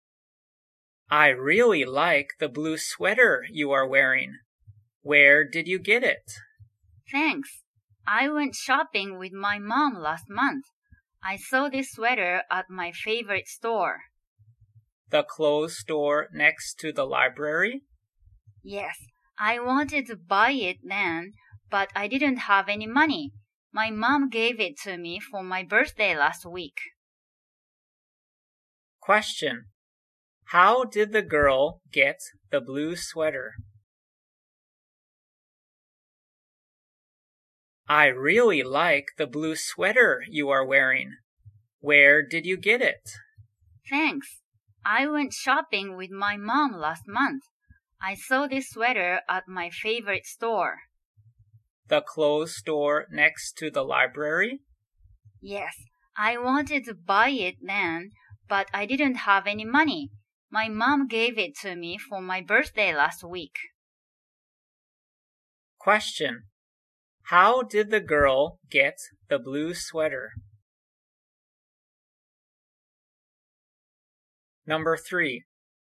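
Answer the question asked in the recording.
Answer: Her mom gave it to her for her birthday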